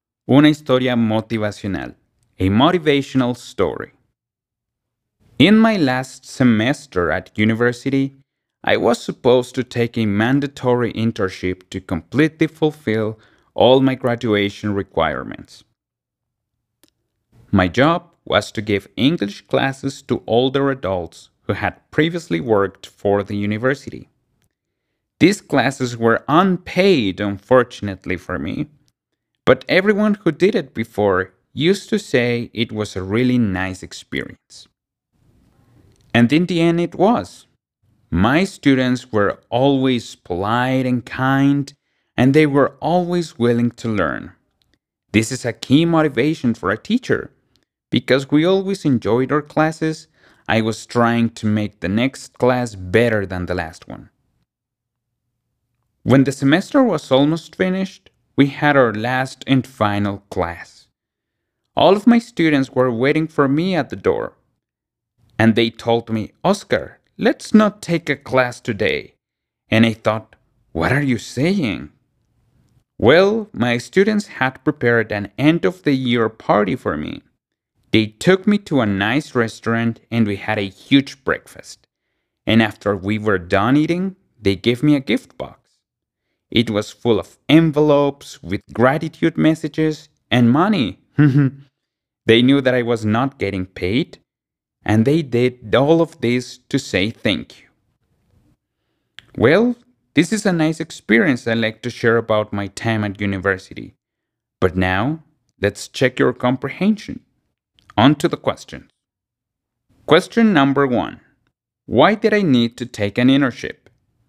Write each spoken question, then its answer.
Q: Why did I need to take an internship?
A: The answer is, because it was a graduation requirement.